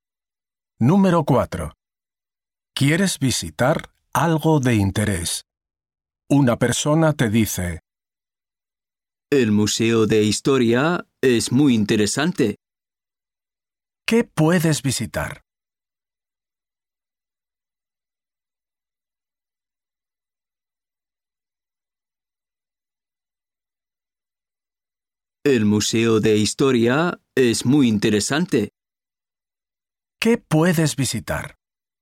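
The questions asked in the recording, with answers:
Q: ¿Qué puedes visitar?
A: El Museo de Historia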